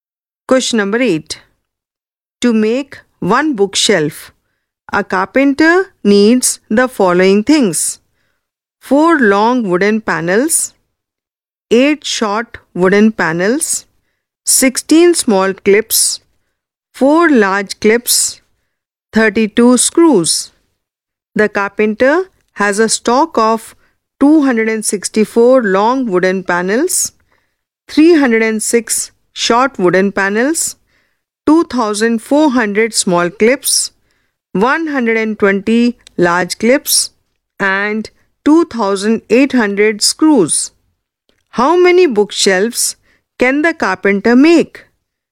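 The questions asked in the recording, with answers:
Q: How many bookshelves can the carpenter make?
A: 30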